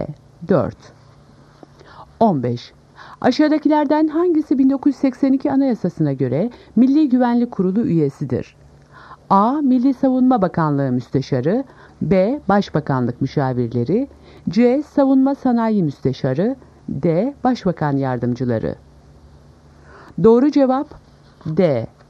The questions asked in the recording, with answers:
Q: Aşağıdakilerden hangisi 1982 Anayasası'na göre Milli Güvenlik Kurulu üyesidir?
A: Doğru cevap D. Başbakan Yardımcıları.